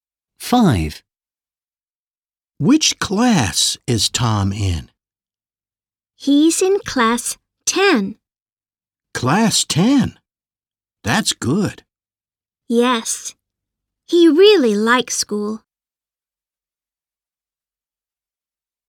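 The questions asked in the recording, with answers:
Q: Which class is Tom in?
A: 10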